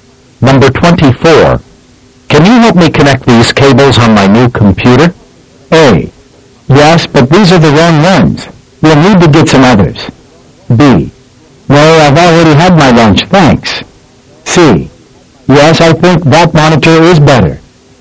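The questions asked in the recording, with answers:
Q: Can you help me connect these cables on my new computer?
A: A: Yes, but these are the wrong ones. We'll need to get some others.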